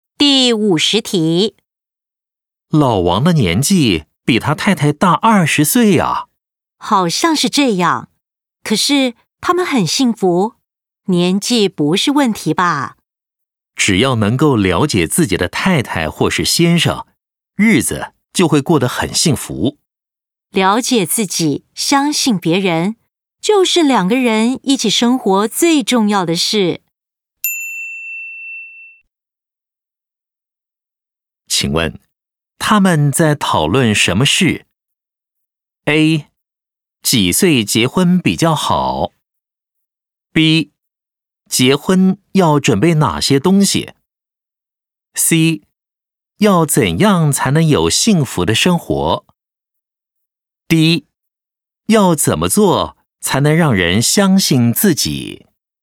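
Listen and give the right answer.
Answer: C: 要怎样才能有幸福的生活?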